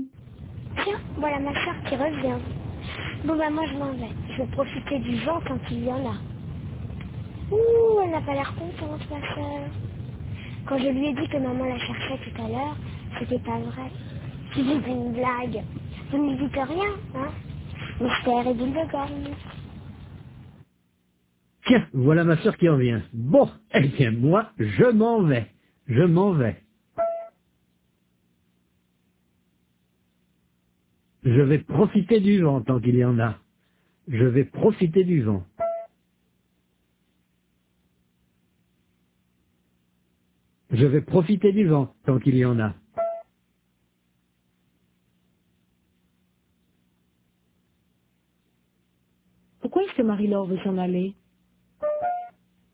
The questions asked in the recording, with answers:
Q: Pourquoi est-ce que Marie-Laure veut s'en aller?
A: Parce qu'elle veut profiter du vent, tant qu'il y en a.